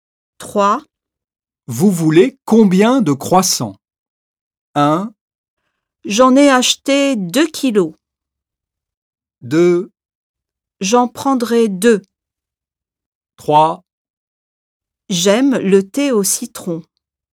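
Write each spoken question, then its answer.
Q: Vous voulez combien de croissants?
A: 2: J'en prendrai 2.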